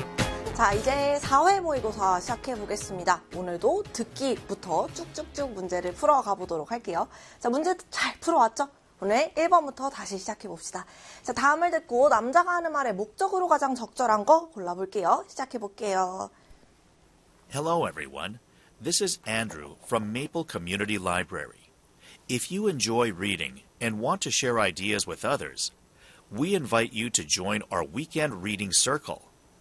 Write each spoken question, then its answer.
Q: 다음을 듣고 남자가 하는 말의 목적으로 가장 적절한 거 골라볼게요.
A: 도서관에서 열리는 독서 모임에 초대하려고, 홍보하려고가 되겠습니다.